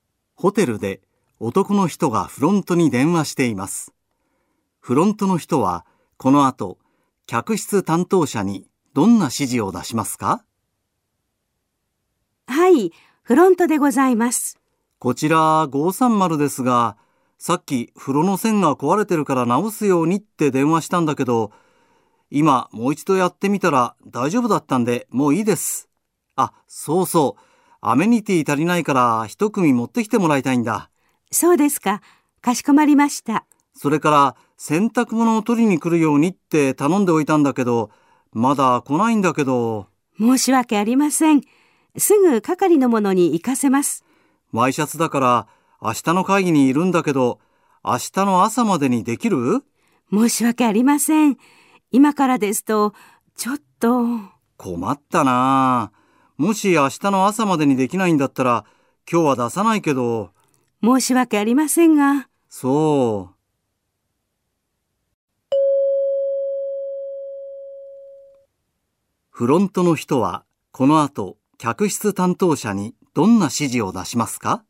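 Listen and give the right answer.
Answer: 530号室にアメニティを一組持っていくように指示する(風呂の修理と洗濯物の回収は不要)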